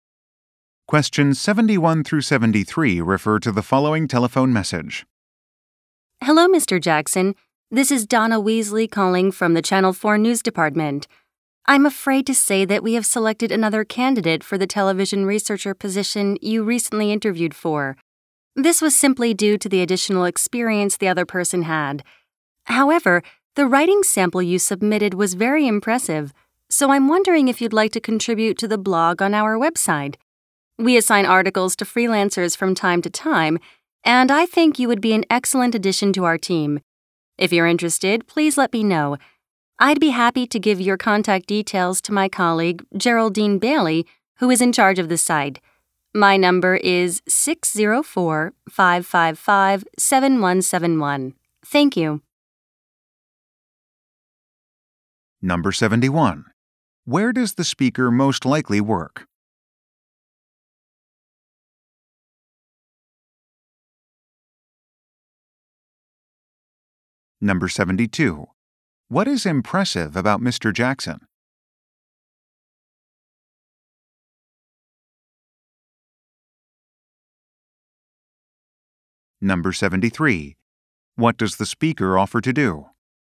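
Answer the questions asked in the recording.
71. At a television station
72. His writing sample
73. Give his contact details to a colleague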